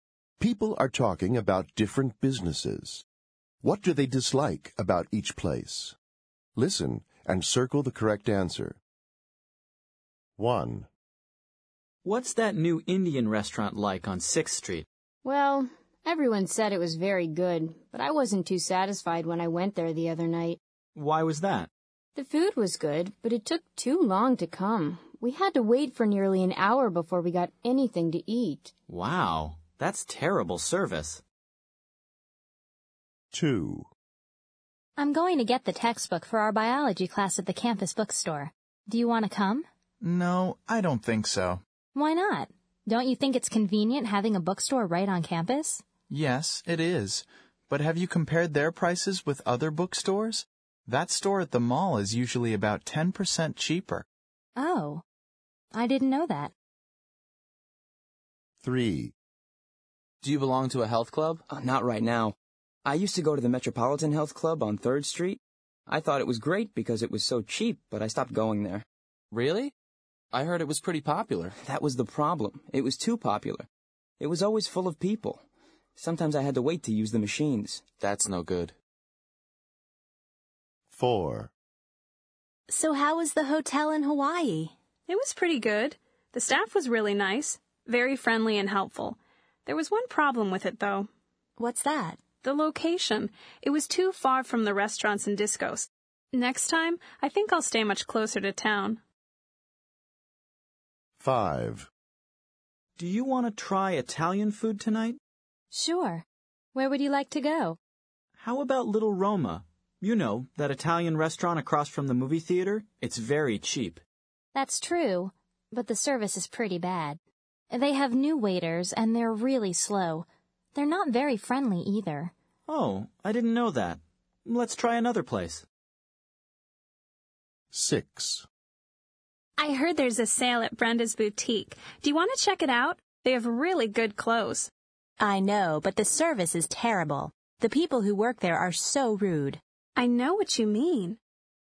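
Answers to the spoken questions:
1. The food took too long to come (slow service)
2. The prices are high
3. It was too crowded
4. The location was too far from town
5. The service is bad (slow, unfriendly waiters)
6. The service; the staff are rude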